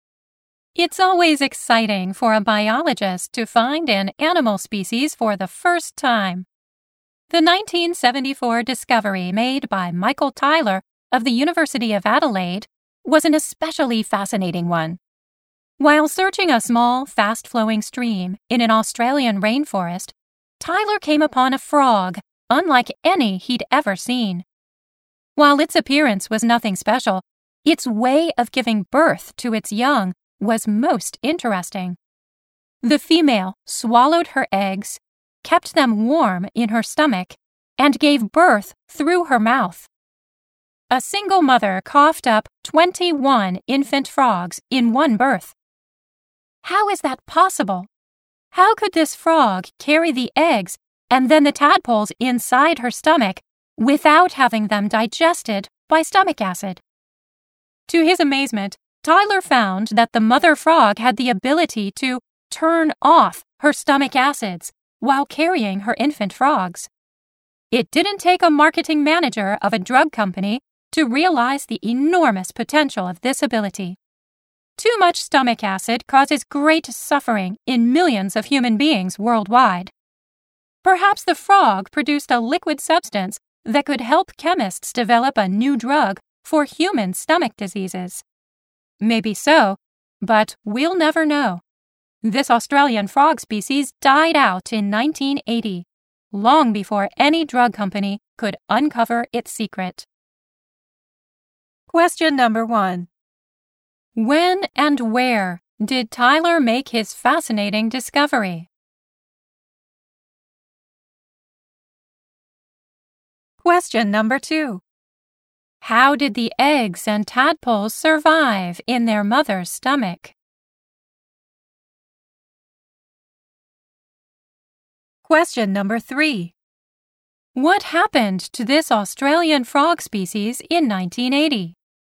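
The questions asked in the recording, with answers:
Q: When and where did Tyler make his fascinating discovery?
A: In 1974, in a small, fast-flowing stream in an Australian rainforest

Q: How did the eggs and tadpoles survive in their mother's stomach?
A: The mother frog could turn off her stomach acids

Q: What happened to this Australian frog species in 1980?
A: It died out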